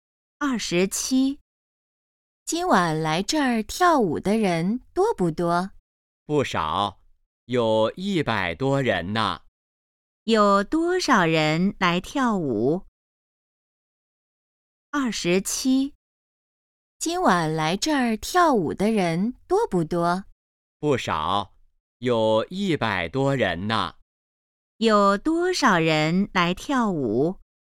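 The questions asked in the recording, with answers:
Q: 有多少人来跳舞?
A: 100多人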